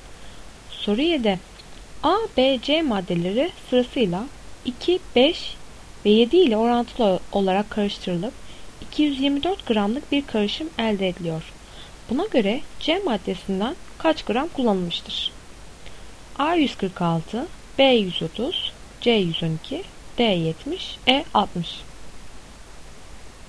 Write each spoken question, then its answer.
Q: Buna göre C maddesinden kaç gram kullanılmıştır?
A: Doğru cevap C 112.